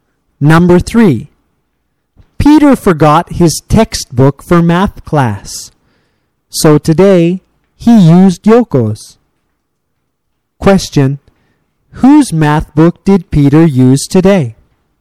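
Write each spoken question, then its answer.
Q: Whose math book did Peter use today?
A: Yoko's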